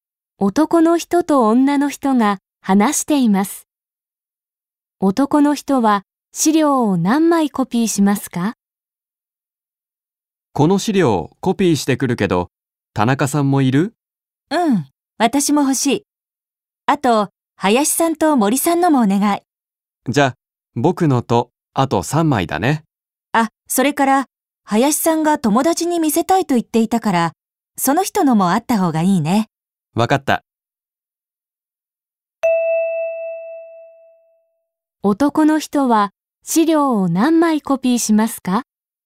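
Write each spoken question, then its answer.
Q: 男の人は資料を何枚コピーしますか?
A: 5枚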